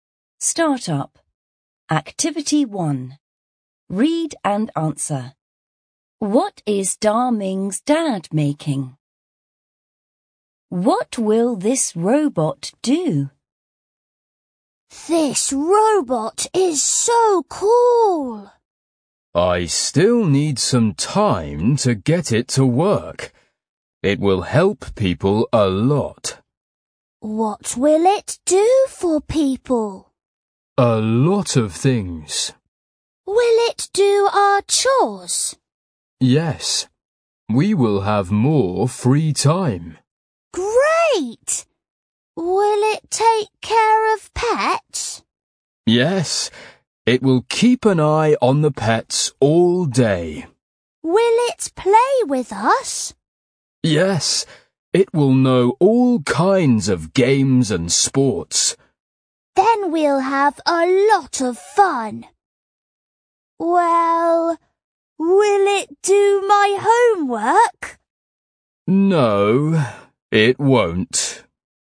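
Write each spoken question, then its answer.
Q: What is Da Ming's dad making?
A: A robot

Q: What will this robot do?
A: It will help people: do chores, take care of pets and play games and sports with them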